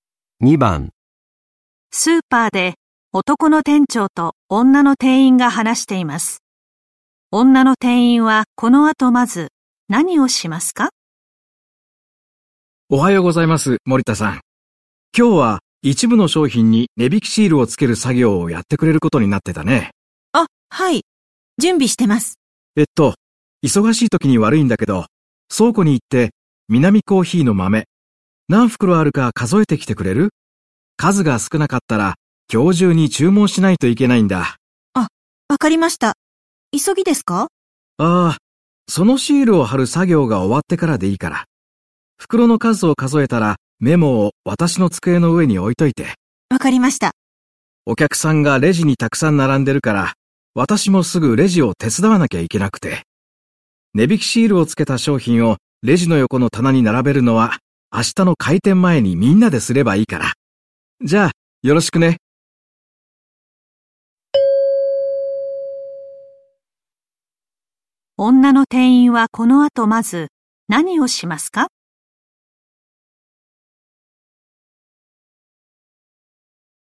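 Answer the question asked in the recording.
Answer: 商品に値引きシールをつける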